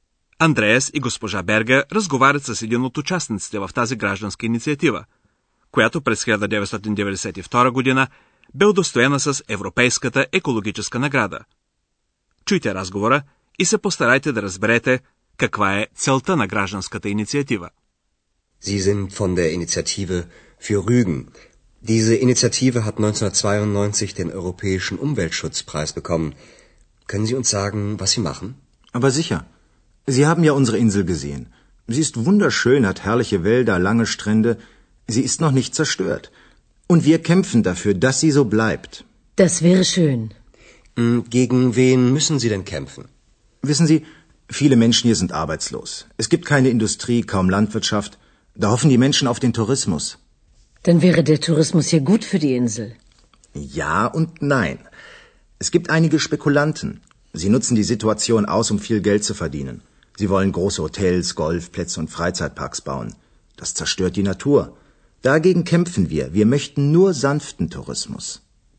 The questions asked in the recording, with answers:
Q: чуйте разговора и се постарайте да разберете каква е целта на гражданската инициатива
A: Целта на инициативата е кротък туризъм, както се изразява събеседникът на Андреас и госпожа Бергер, а не масовия туризъм, който разрушава природата.